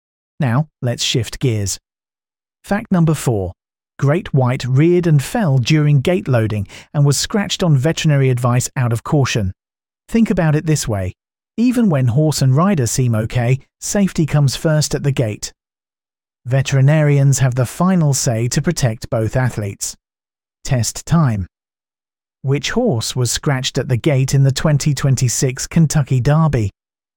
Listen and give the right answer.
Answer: Correct answer, Great White.